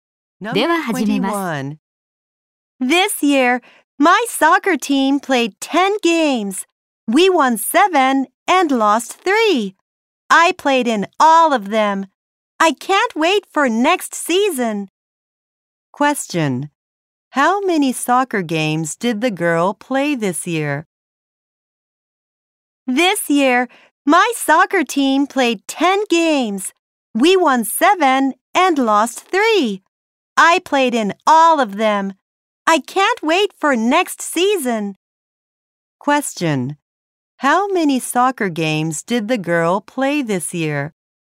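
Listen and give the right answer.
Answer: 10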